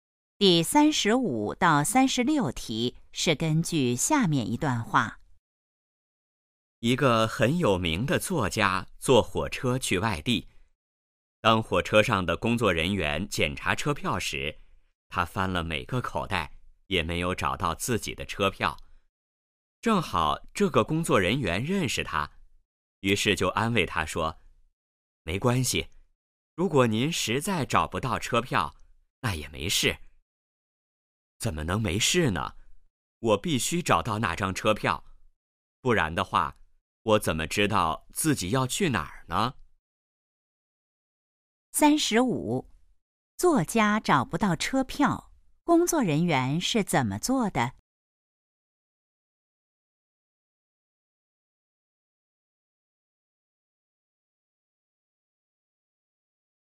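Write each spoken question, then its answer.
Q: 作家找不到车票,工作人员是怎么做的?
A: 安慰他说没关系

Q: 作家为什么一定要找车票?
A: 不知道自己要去哪儿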